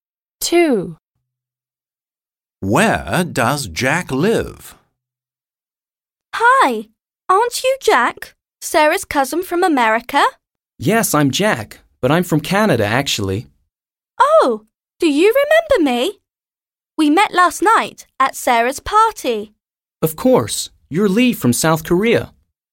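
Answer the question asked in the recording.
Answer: Canada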